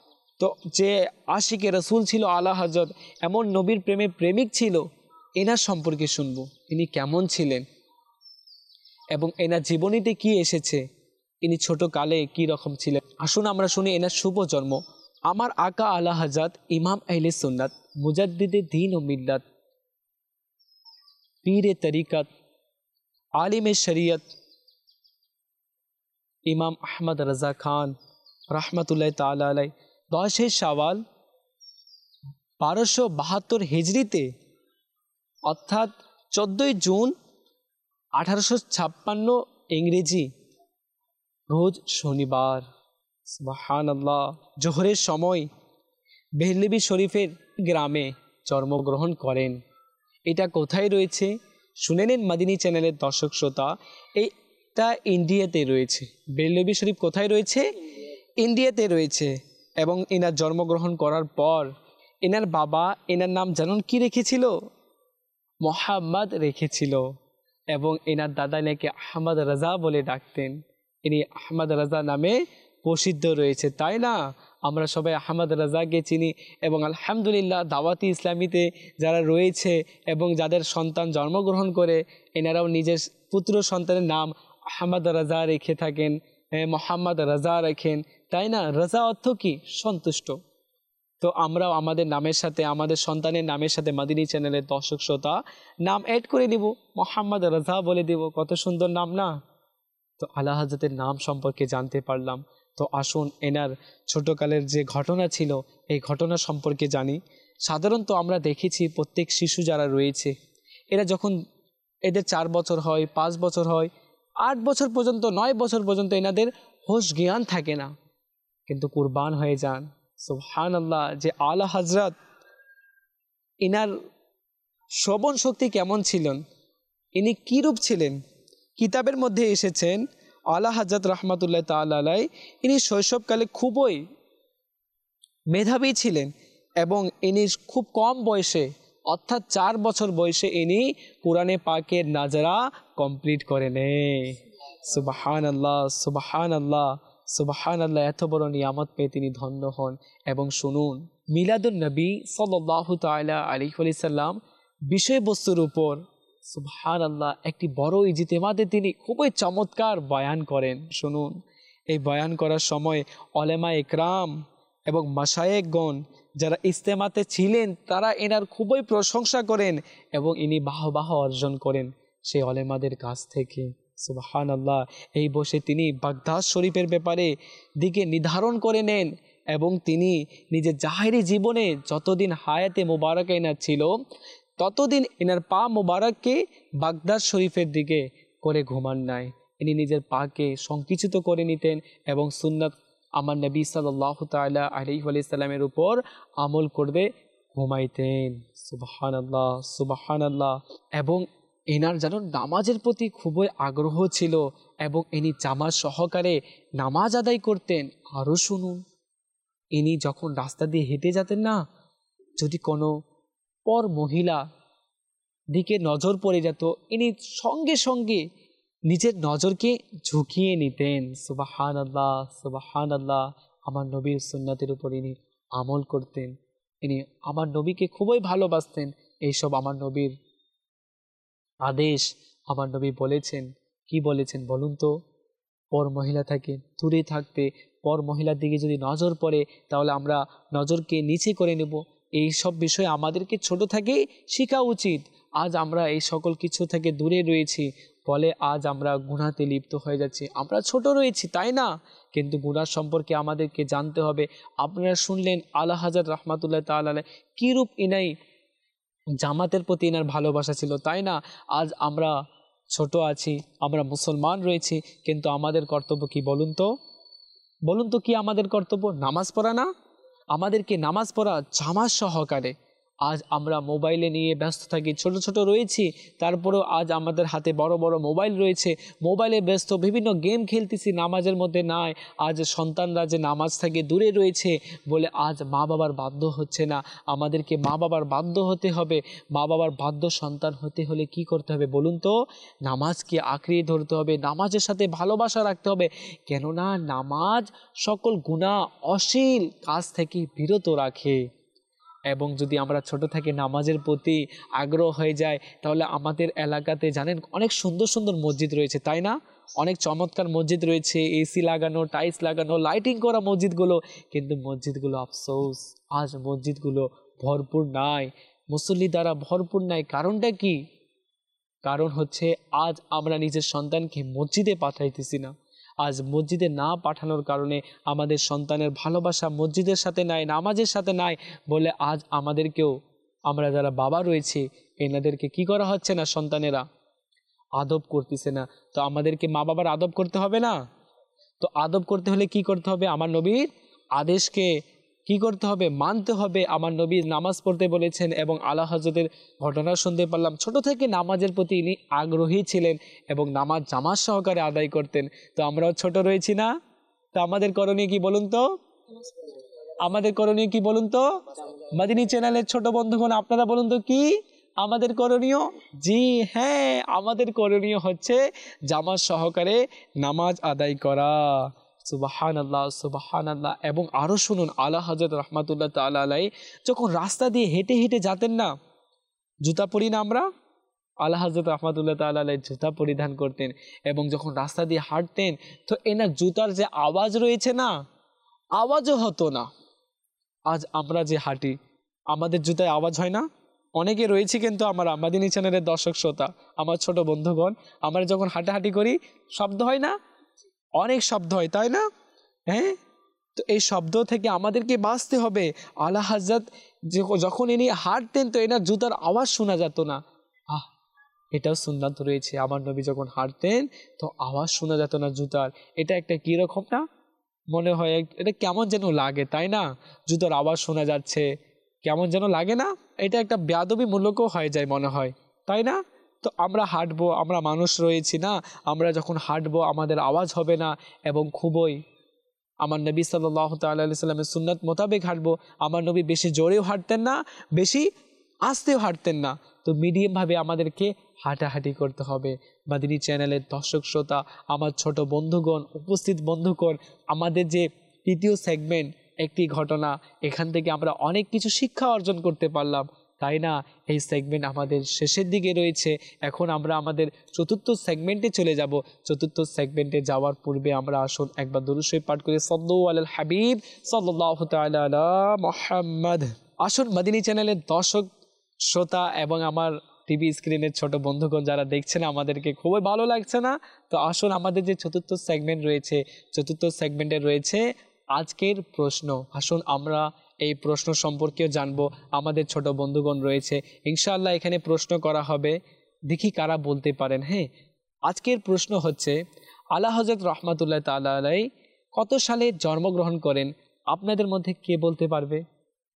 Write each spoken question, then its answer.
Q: হ্যাঁ, আজকের প্রশ্ন হচ্ছে, আলা হযরত রহমাতুল্লাহ তাআলা আলাই কত সালে জন্মগ্রহণ করেন, আপনাদের মধ্যে কে বলতে পারবে?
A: আলা হযরত রহমাতুল্লাহ তাআলা আলাই 10ই শাওয়াল 1272 হিজরি মোতাবেক 14ই জুন 1856 সালে জোহরের সময়ে জন্মগ্রহণ করেন।